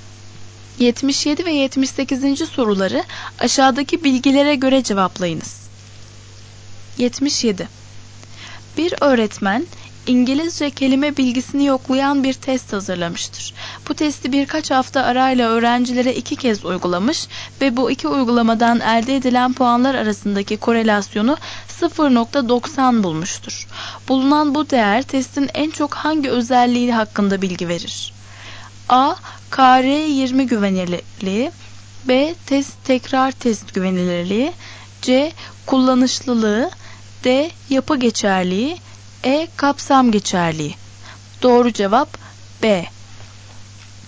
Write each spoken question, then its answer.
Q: Bulunan bu değer testin en çok hangi özelliği hakkında bilgi verir?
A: Doğru cevap B.